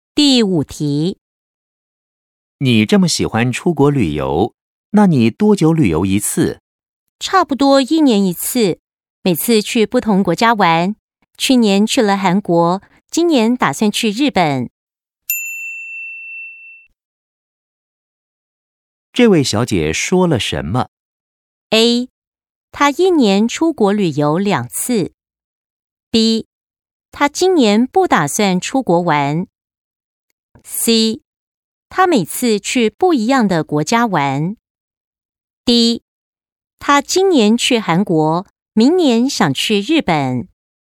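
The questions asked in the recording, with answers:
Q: 这位小姐说了什么?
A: C: 她每次去不一样的国家玩。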